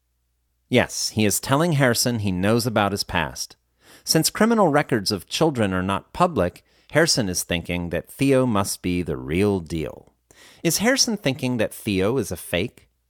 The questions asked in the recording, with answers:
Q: Is Harrison thinking that Theo is a fake?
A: No, he isn't thinking that Theo is a fake.